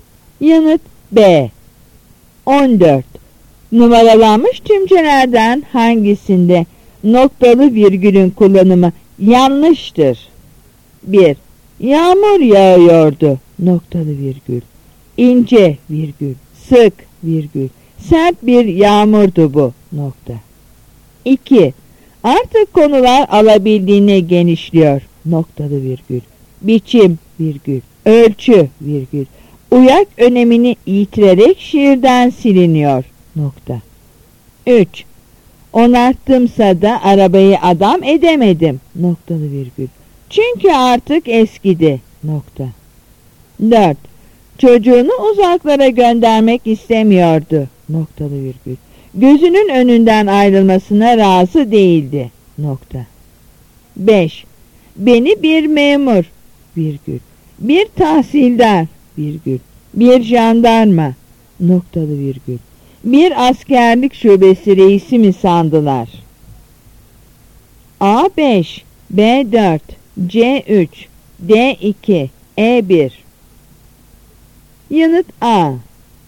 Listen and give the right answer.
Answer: Yanıt A.